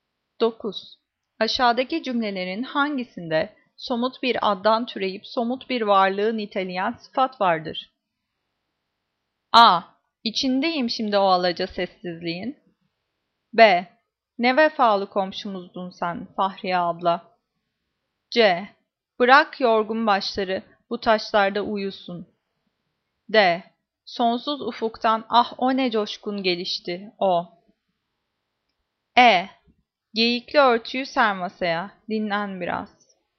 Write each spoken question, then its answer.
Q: Aşağıdaki cümlelerin hangisinde somut bir addan türeyip somut bir varlığı niteleyen sıfat vardır?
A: Cevap E. Geyikli örtüyü ser masaya, dinlen biraz.